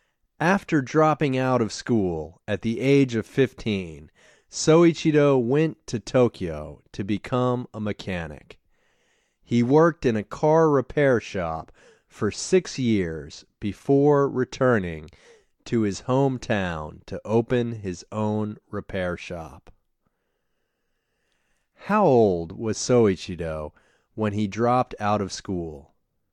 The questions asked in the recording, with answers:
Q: How old was Soichiro when he dropped out of school?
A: Soichiro was 15 when he dropped out of school.